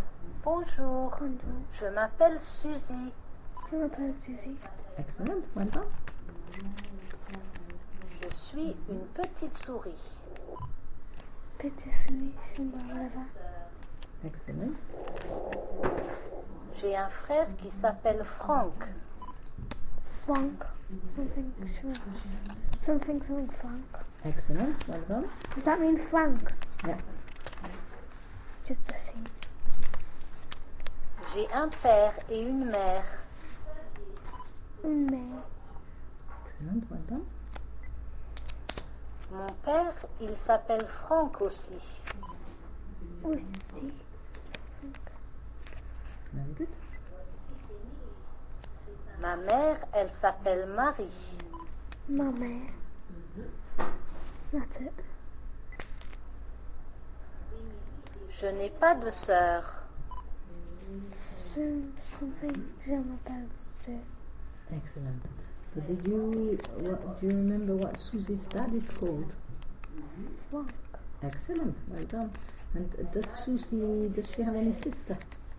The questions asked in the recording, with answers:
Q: do you remember what Susie's dad is called?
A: Frank.